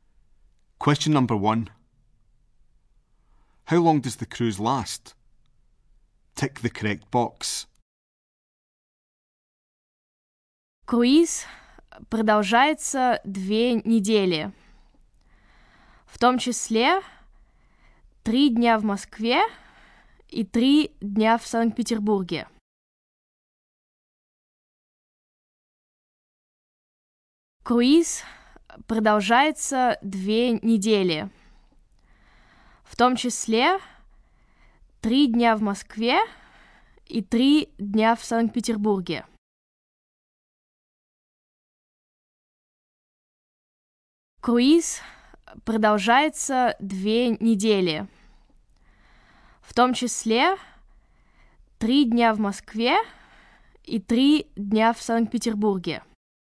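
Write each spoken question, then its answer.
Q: How long does the cruise last?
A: Two weeks (including 3 days in Moscow and 3 in St Petersburg)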